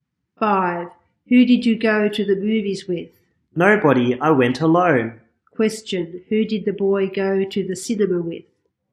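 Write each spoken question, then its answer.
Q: Question, who did the boy go to the cinema with?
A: Nobody, he went alone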